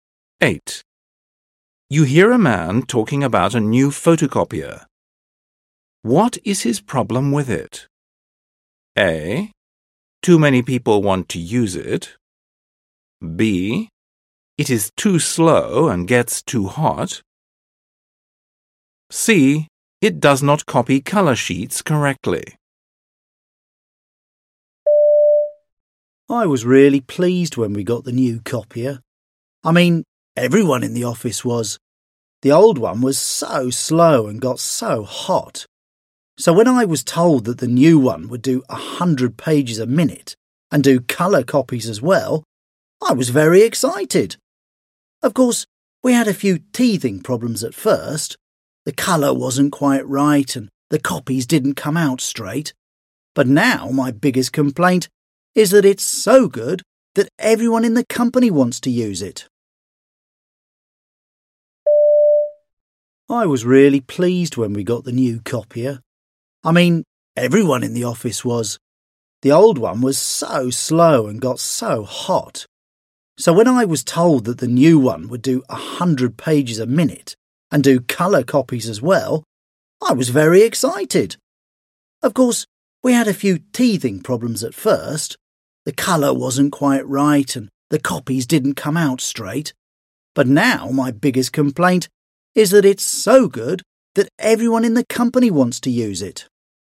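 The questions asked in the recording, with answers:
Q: What is his problem with it?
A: A: Too many people want to use it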